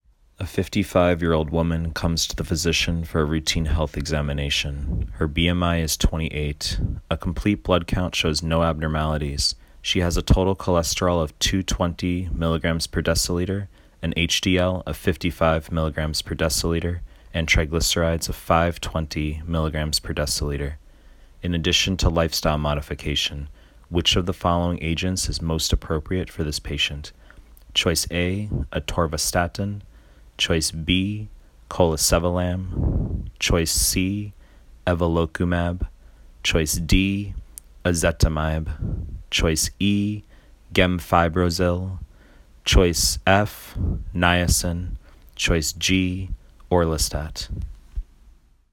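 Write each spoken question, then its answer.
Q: In addition to lifestyle modification, which of the following agents is most appropriate for this patient?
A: E: gemfibrozil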